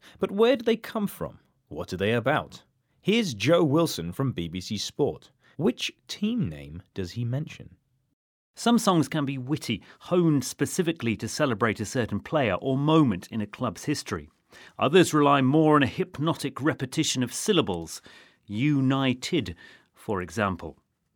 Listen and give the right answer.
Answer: Well, he used the syllables from United.